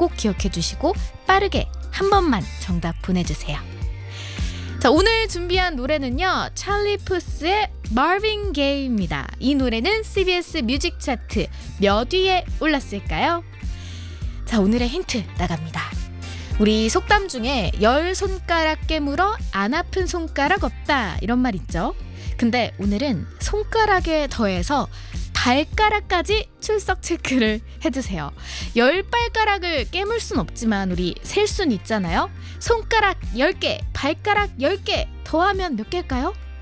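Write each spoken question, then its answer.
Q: 이 노래는 CBS 뮤직 차트 몇 위에 올랐을까요?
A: 20위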